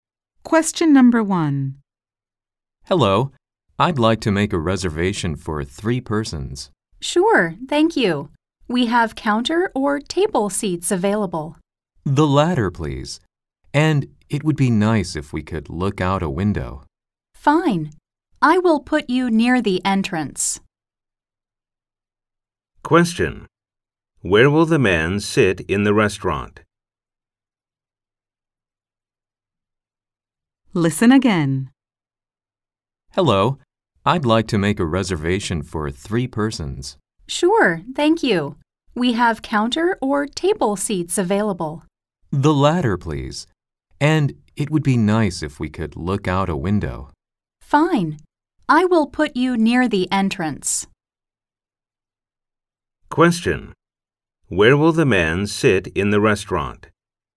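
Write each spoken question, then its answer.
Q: Where will the man sit in the restaurant?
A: At a table by a window near the entrance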